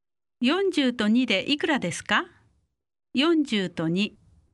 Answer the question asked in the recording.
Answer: 42